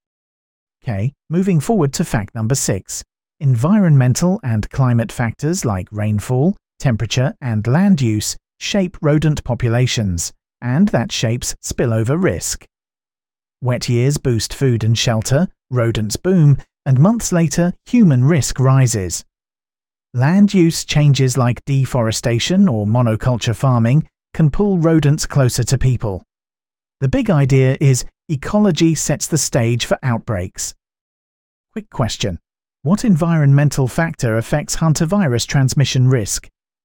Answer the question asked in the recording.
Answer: Correct answer, rainfall.